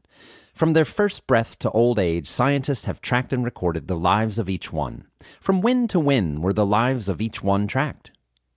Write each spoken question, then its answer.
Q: From when to when were the lives of each one tracked?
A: From their first breath to old age, the lives of each one was tracked.